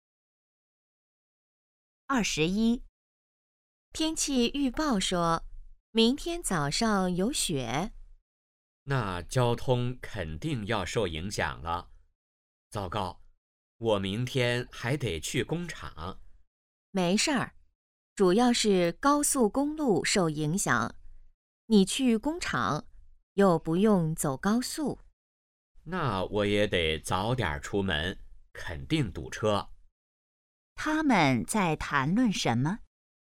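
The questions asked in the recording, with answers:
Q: 他们在谈论什么?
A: 下雪对交通的影响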